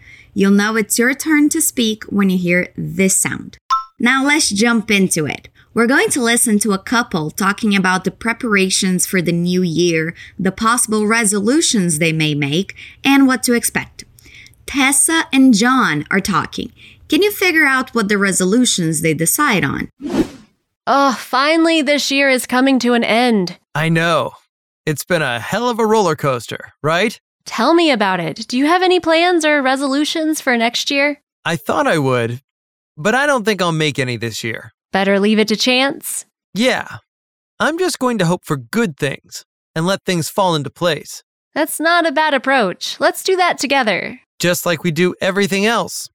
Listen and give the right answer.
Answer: They decide not to make any resolutions.